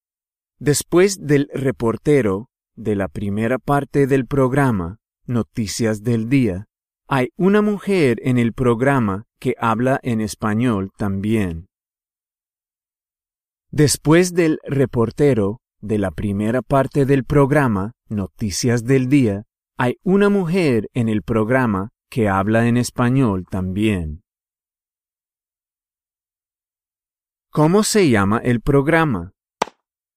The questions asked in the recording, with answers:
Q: ¿Cómo se llama el programa?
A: Noticias del Día.